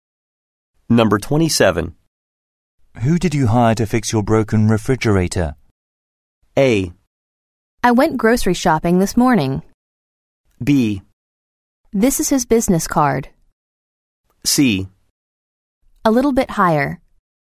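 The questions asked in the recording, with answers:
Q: Who did you hire to fix your broken refrigerator?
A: B: This is his business card.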